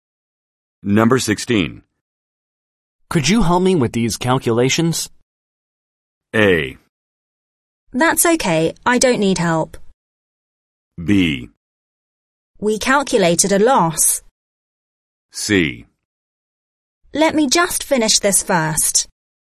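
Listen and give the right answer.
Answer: C: Let me just finish this first.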